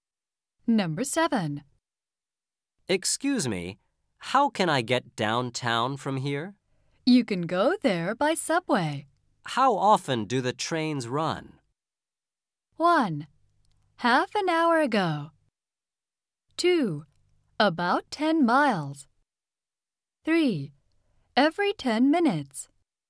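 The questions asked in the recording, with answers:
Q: How often do the trains run?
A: 3: Every 10 minutes.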